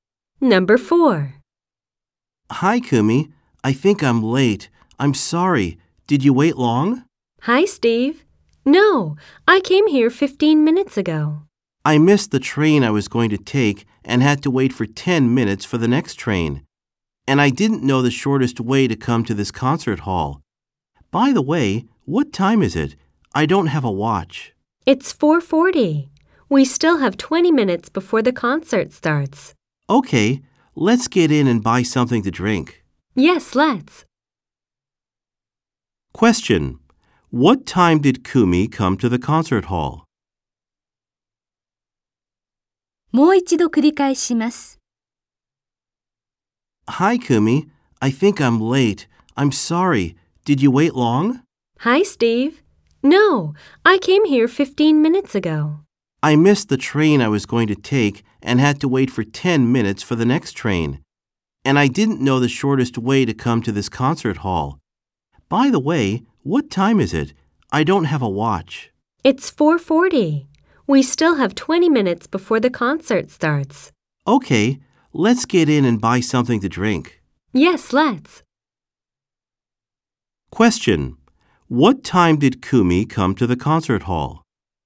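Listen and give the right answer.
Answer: At 4:25.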